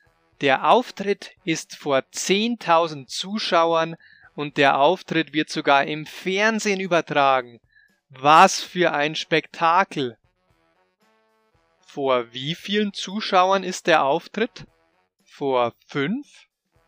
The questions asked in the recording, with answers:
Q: Vor wie vielen Zuschauern ist der Auftritt?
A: Nein, der Auftritt ist nicht vor fünf, sondern vor 10.000 Zuschauern.